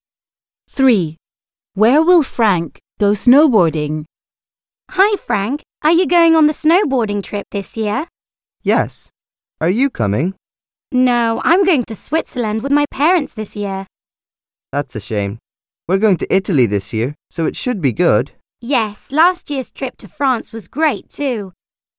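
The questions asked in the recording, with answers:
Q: Where will Frank go snowboarding?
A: Italy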